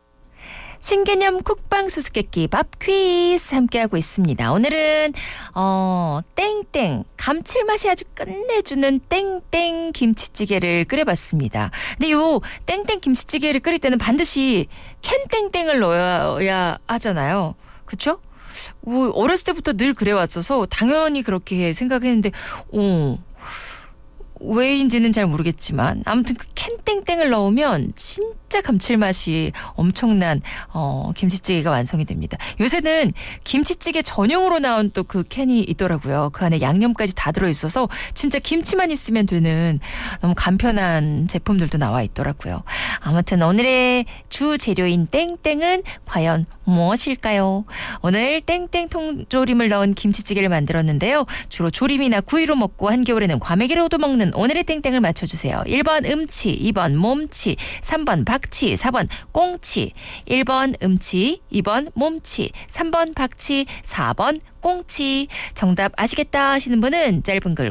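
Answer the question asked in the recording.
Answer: 4: 꽁치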